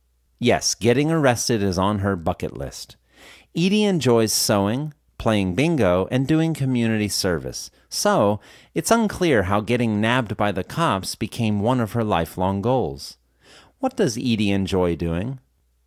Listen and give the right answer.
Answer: Edie enjoys sewing, playing bingo, and doing community service.